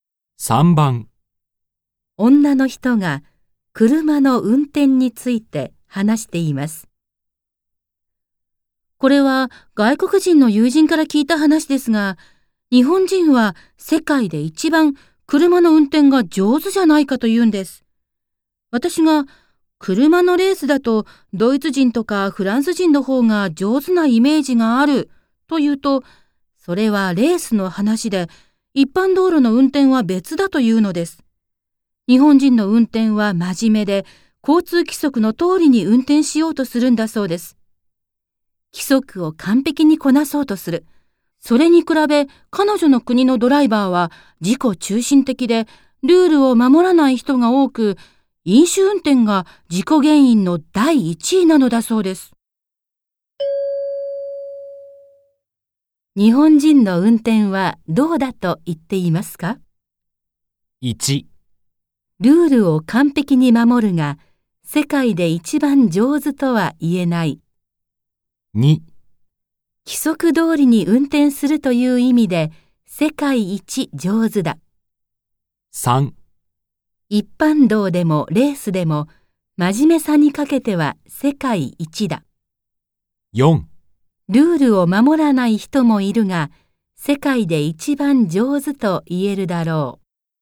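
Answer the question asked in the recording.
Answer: 2: 規則通りに運転するという意味で、世界一上手だ。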